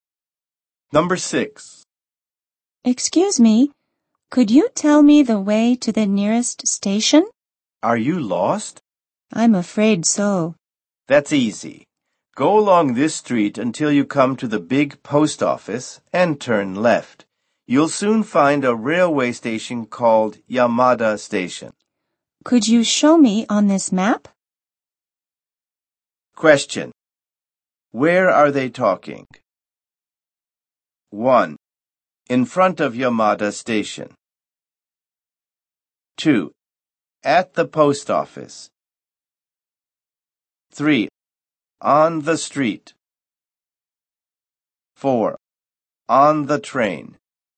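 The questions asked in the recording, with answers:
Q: Where are they talking?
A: 3: On the street.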